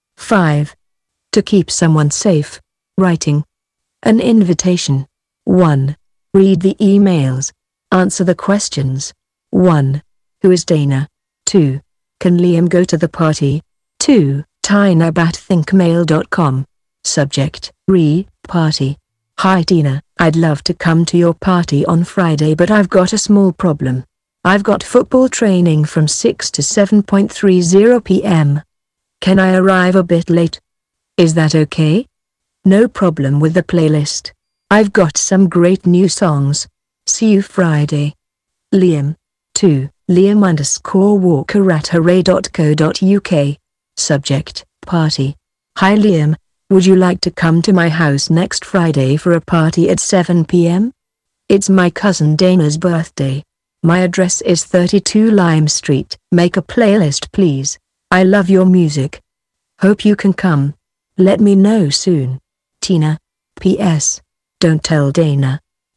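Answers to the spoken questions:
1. Tina's cousin, whose birthday party it is
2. Yes, but he will arrive a bit late because of football training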